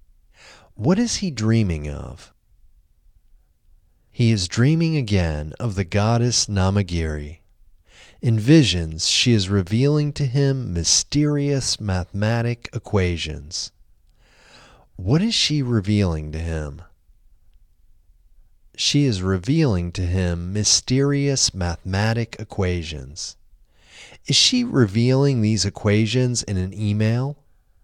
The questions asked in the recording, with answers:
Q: What is she revealing to him?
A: She is revealing to him mysterious mathematic equations.

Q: Is she revealing these equations in an email?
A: No, she isn't revealing these equations in an email.